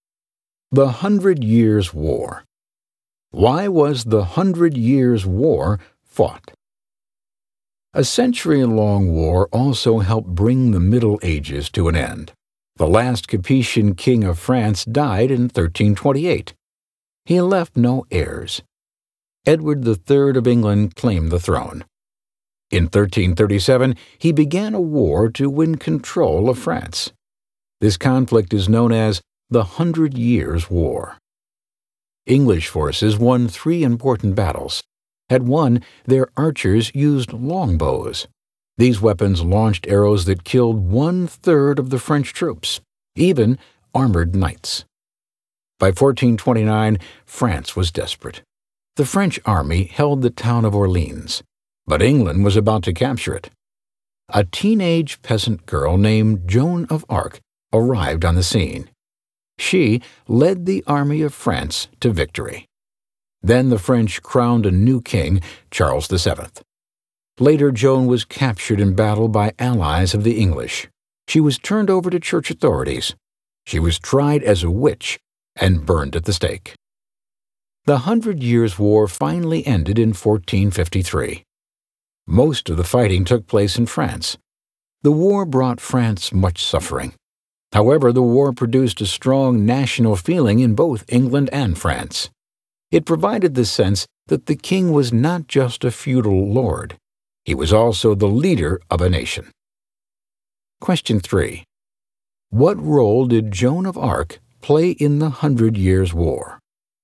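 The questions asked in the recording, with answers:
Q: What role did Joan of Arc play in the Hundred Years' War?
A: She led the French army to victory at Orleans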